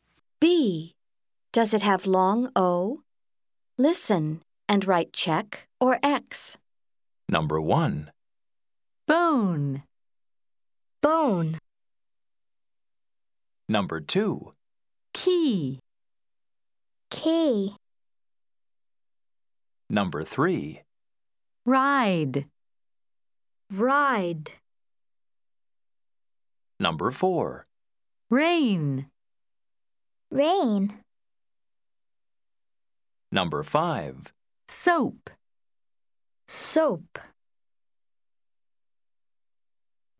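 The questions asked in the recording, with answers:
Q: Does it have long O?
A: Yes (check): bone

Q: Does it have long O?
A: No (X): key

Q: Does it have long O?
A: No (X): ride

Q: Does it have long O?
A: No (X): rain

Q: Does it have long O?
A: Yes (check): soap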